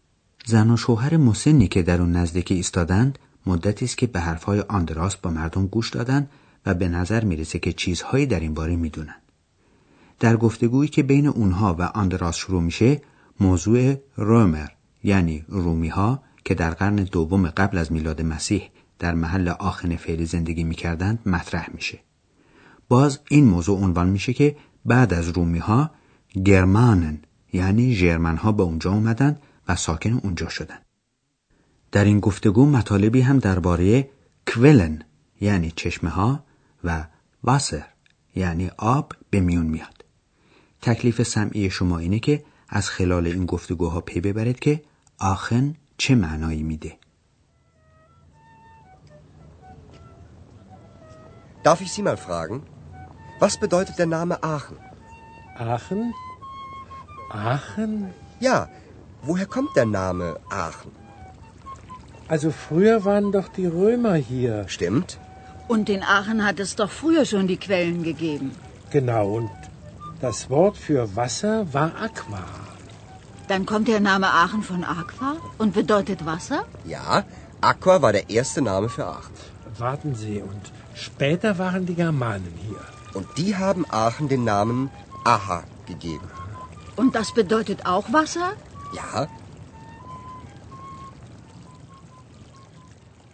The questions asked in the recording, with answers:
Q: تکلیف سمعی شما اینه که از خلال این گفتگوها پی ببرید که آخن چه معنایی میده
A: پس معلوم شد که معنای لغوی اسم آخن هست آب